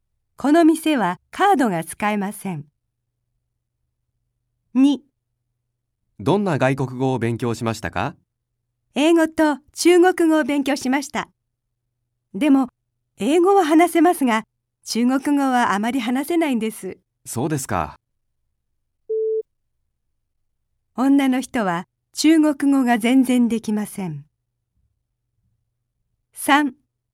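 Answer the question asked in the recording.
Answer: ×(間違い)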